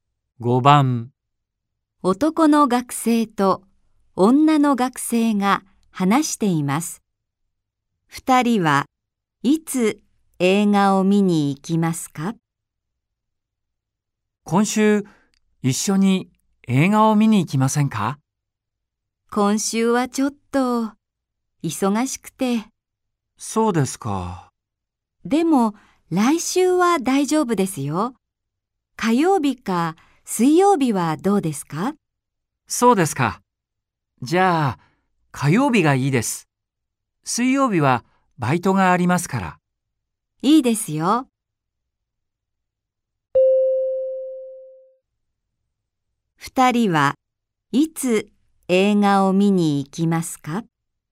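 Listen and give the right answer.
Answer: 来週の火曜日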